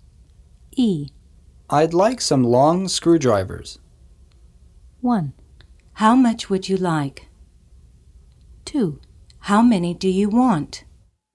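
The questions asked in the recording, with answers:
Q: I'd like some long screwdrivers.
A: 2: How many do you want?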